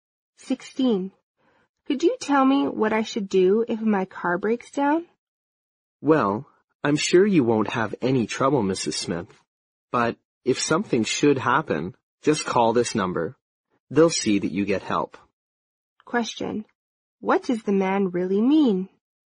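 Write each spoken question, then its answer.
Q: What does the man really mean?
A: She probably won't have trouble, but if the car breaks down she should call the number to get help.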